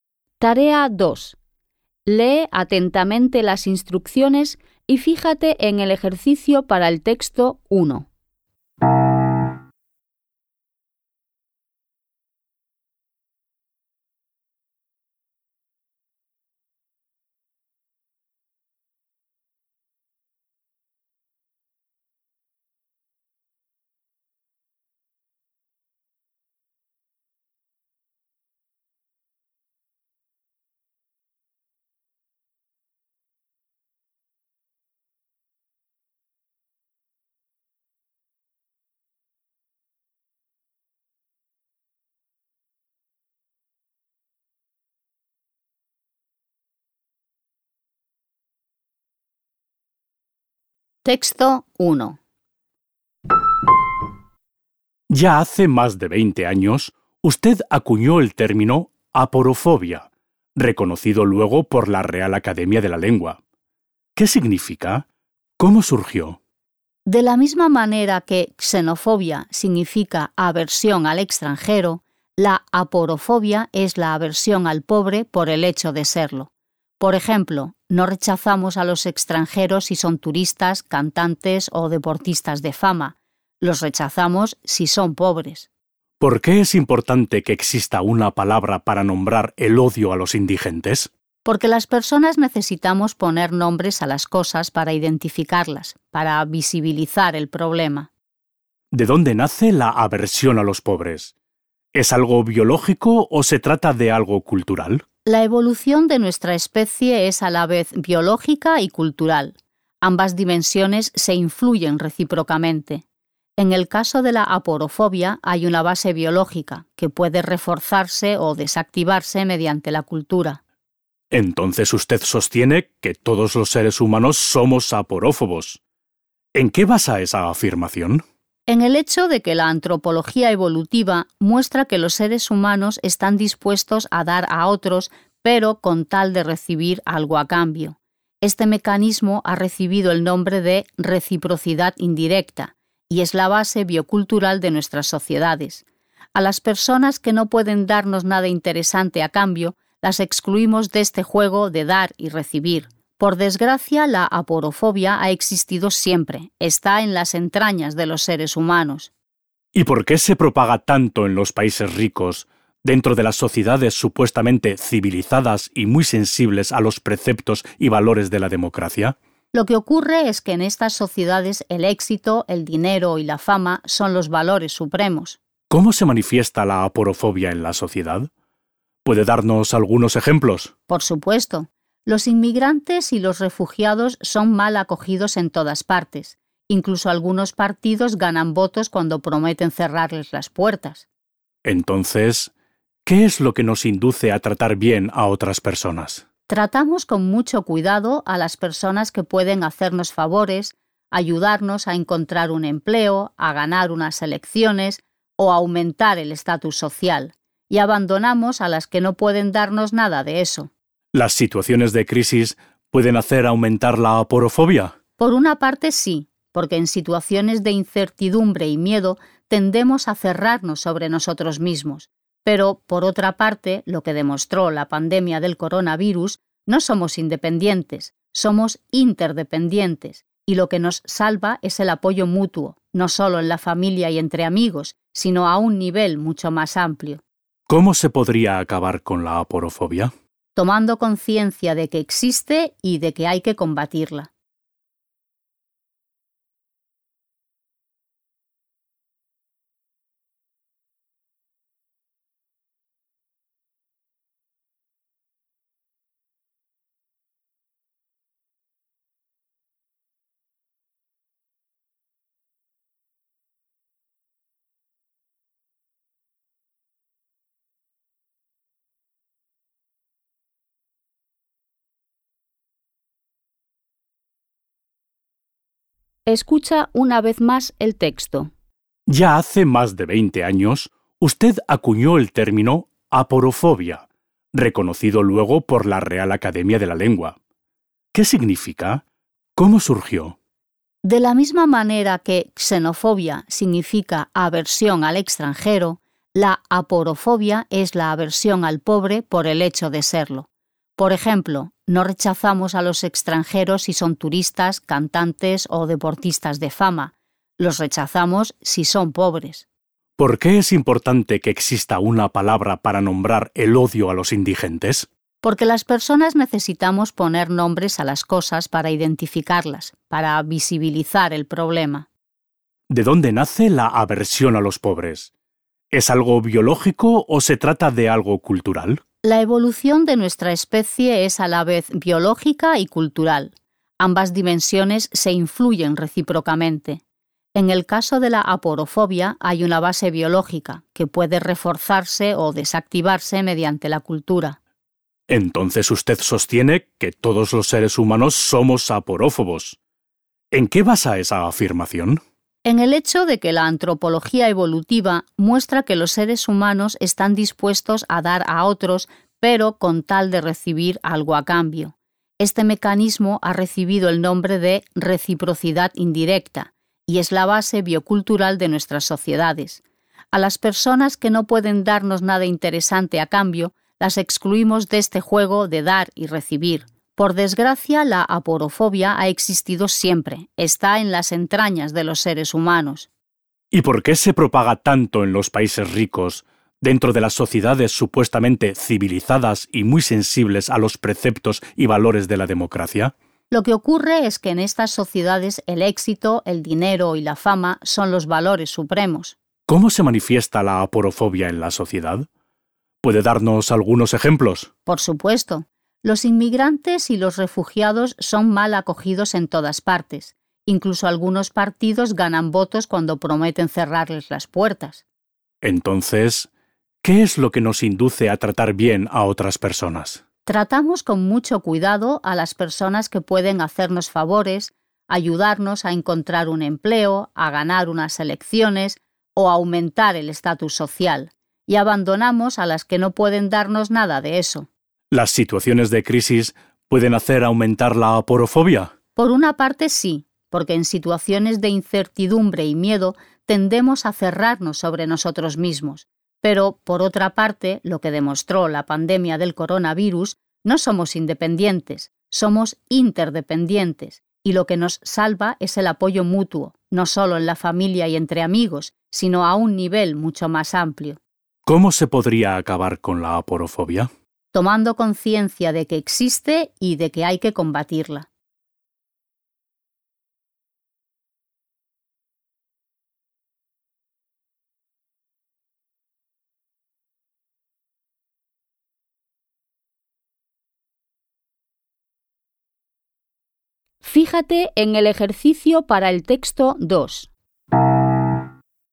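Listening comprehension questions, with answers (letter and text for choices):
Vas a escuchar dos textos. Elige la respuesta correcta de entre las cuatro opciones que se ofrecen (A, B, C o D) y márcala con un círculo. Las preguntas 2.1.–2.4. corresponden al Texto 1 y las preguntas 2.5. y 2.6. corresponden al Texto 2. Escucharás la grabación dos veces.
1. El término "aporofobia" surgió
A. por decisión de un gremio.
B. a raíz de un malentendido cultural.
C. como sustituto de la palabra "xenofobia".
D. para concienciar a la gente sobre la existencia de un problema.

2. Según la entrevistada, la aporofobia es un fenómeno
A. de carácter universal.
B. propio de los países pobres.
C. de índole exclusivamente biológica.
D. en declive en sociedades democráticas.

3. Entre las razones que nos inducen a tratar bien a otras personas NO se citan los motivos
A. políticos.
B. laborales.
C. de prestigio.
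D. sentimentales.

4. La científica afirma que las crisis contribuyen a que la gente tome conciencia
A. de la fragilidad de los vínculos familiares.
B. del valor de ser una persona independiente.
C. de la importancia de la solidaridad con los demás.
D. de la necesidad de reconsiderar la fuerza de los lazos de amistad.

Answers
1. D. para concienciar a la gente sobre la existencia de un problema.
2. A. de carácter universal.
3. D. sentimentales.
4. C. de la importancia de la solidaridad con los demás.

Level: Poziom: dwujęzyczny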